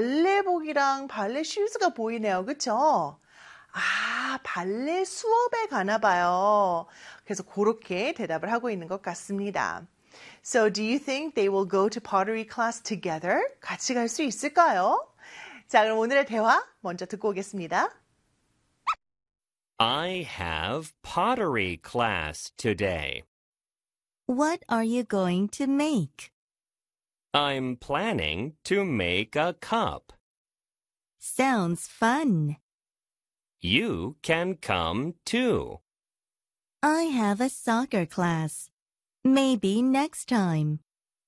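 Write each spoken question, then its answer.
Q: So, do you think they will go to pottery class together?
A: No, the girl has a soccer class.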